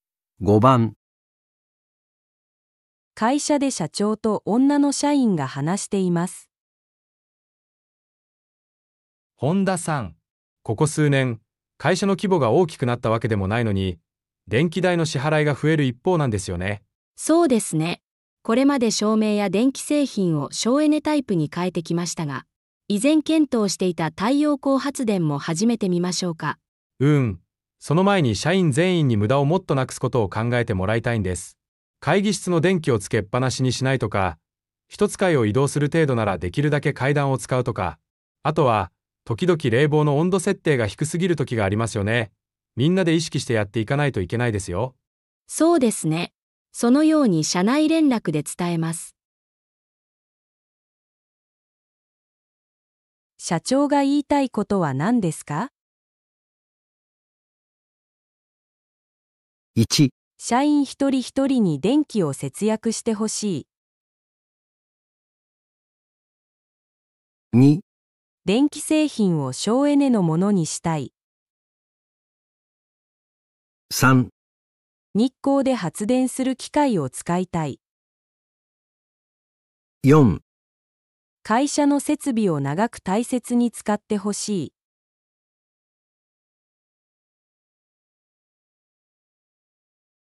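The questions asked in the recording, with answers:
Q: 社長が言いたいことは何ですか?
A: 1: 社員一人一人に電気を節約してほしい。

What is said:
会社で社長と女の社員が話しています。
男:本田さん。ここ数年、会社の規模が大きくなったわけでもないのに電気代の支払いが増える一方なんですよね。
女:そうですね。これまで照明や電気製品を省エネタイプに替えてきましたが・・・。以前検討していた太陽光発電も始めてみましょうか。
男:うーん、その前に社員全員に無駄をなくすことを考えてもらいたいんです。会議室の電気をつけっぱなしにしないとか、1つ階を移動する程度ならできるだけ階段を使うとか。あとは、時々冷房の温度設定が低すぎるときがありますよね?みんなで意識してやっていかないといけないですよ。
女:そうですね。そのように社内連絡で伝えます。
1.社員1人1人に電気を節約してほしい
2.電気製品を省エネのものにしたい
3.日光で発電する機械を使いたい
4.会社の設備を長く大切に使ってほしい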